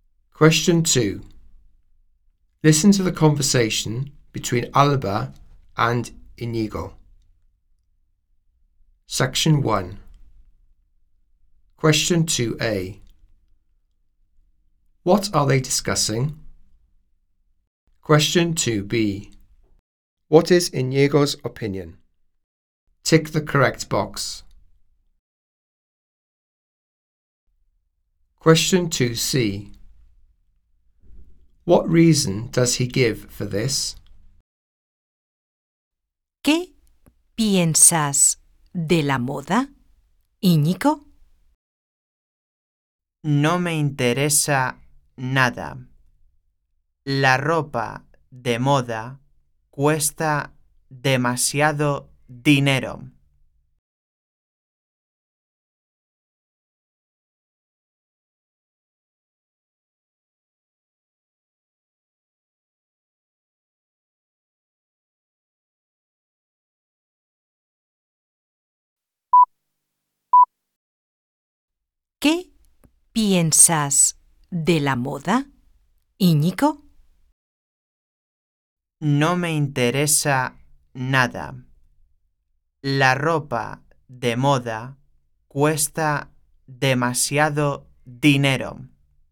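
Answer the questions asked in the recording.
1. Fashion
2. He is not interested at all
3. Fashionable clothes cost too much money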